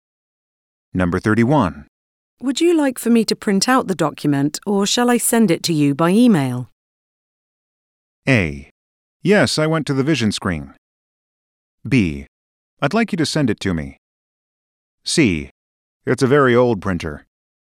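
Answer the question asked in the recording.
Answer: B: I'd like you to send it to me.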